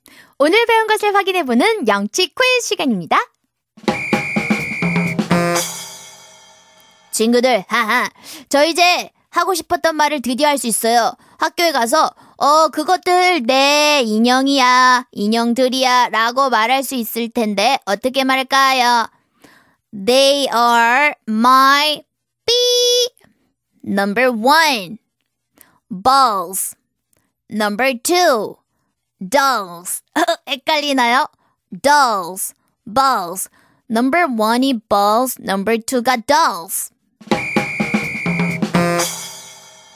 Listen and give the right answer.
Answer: dolls, right? They're my dolls.